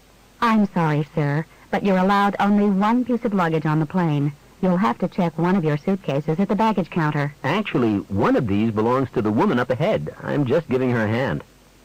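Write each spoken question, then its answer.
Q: What does the man mean?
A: Only one of the suitcases is his; he is helping a woman carry hers.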